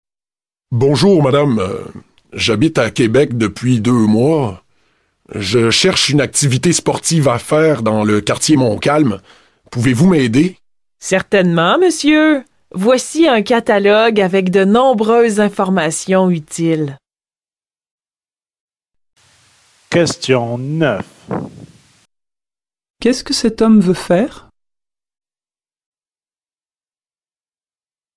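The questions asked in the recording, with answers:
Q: Qu'est-ce que cet homme veut faire?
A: Une activité sportive dans le quartier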